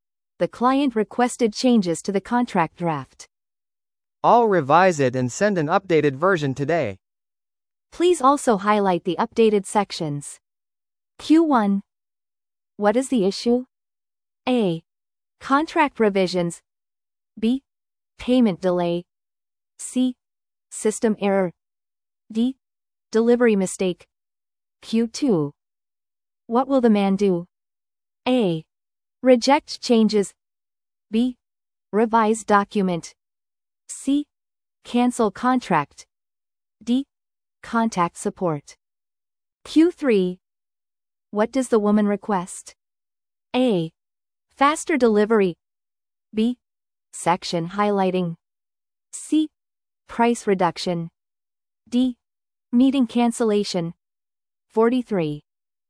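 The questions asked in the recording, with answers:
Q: What is the issue?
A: A: Contract revisions.

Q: What will the man do?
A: B: Revise document.

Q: What does the woman request?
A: B: Section highlighting.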